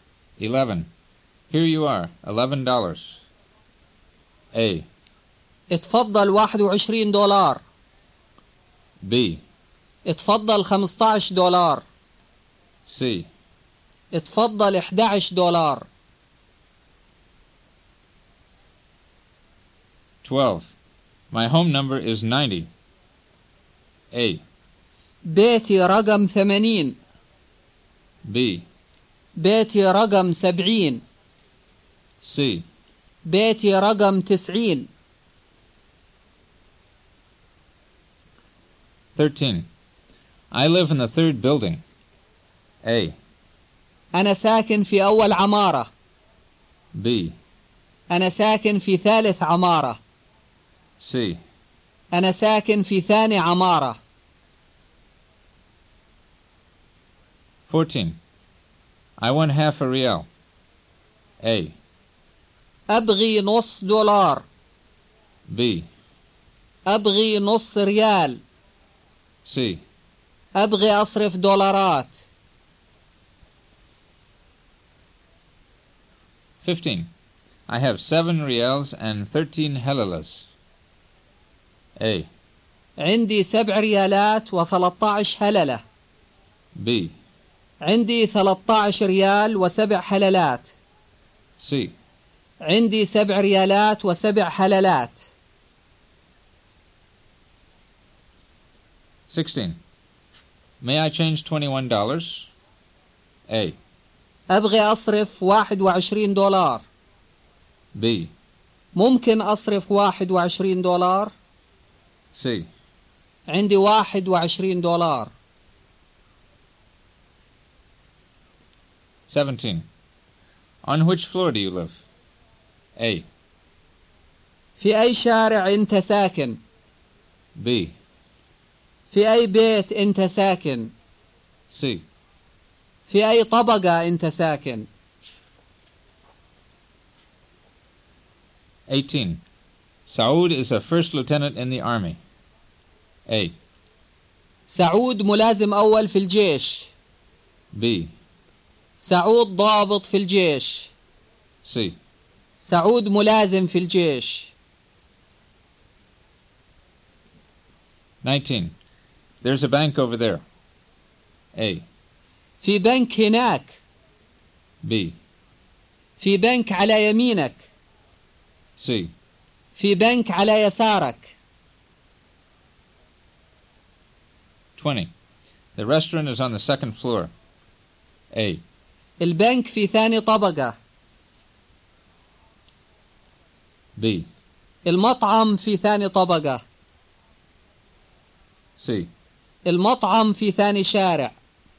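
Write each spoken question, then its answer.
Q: Here you are, $11.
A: C: اتفضل 11 دولار.

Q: My home number is 90.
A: C: بيتي رقم 90.

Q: I live in the third building.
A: B: أنا ساكن في ثالث عمارة.

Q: I want half a real.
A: B: أبغي نص ريال.

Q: I have 7 ريالز and 13 هللز.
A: A: عندي 7 ريالات و 13 هللة.

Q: May I change $21?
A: B: ممكن أصرف $21.

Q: On which floor do you live?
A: C: في أي طبقة أنت ساكن؟

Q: سعود is a first lieutenant in the army.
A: A: سعود ملازم أول في الجيش.

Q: There's a bank over there.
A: A: في بنك هناك.

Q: The restaurant is on the second floor.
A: B: المطعم في ثاني طبقة.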